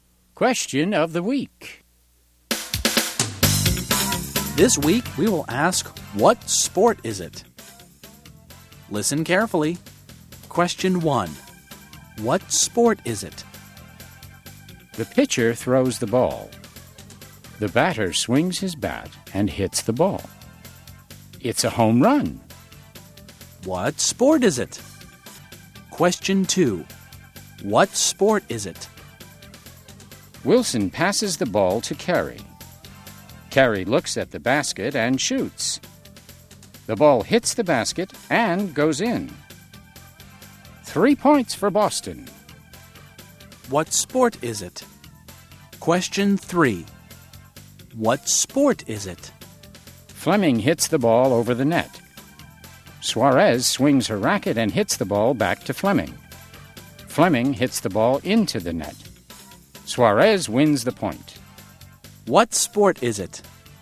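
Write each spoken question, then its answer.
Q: What sport is it?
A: Baseball

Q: What sport is it?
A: Basketball

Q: What sport is it?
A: Tennis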